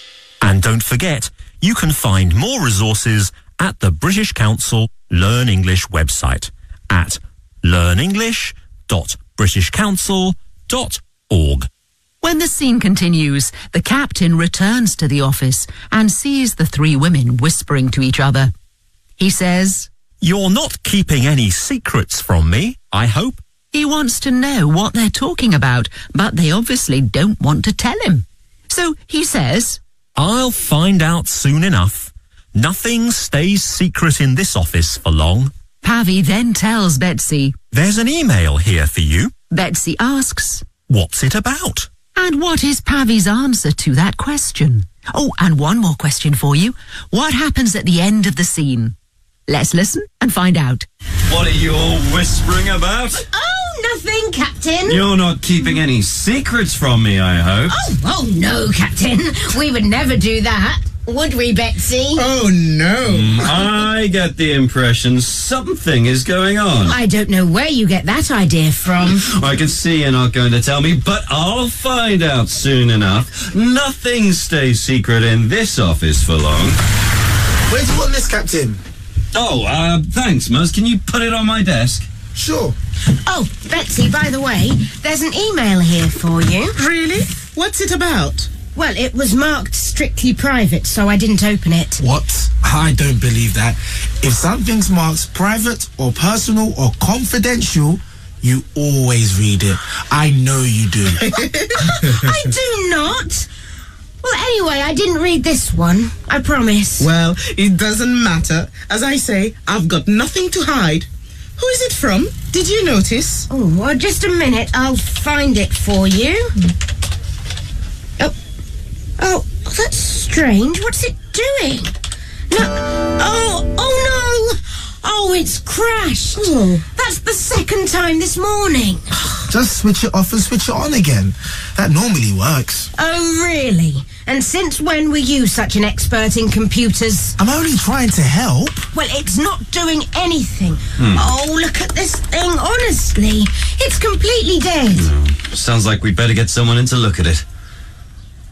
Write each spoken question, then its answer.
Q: And what is Pavi's answer to that question?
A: It was marked strictly private, so I didn't open it.

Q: What happens at the end of the scene?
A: The computer crashes.